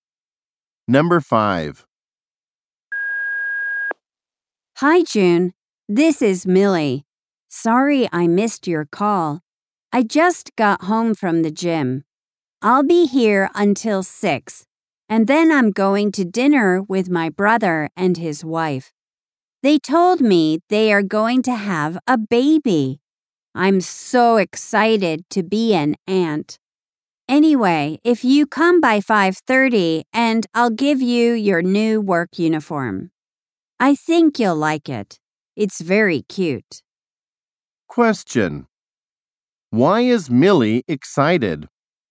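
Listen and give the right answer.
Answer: She is going to be an aunt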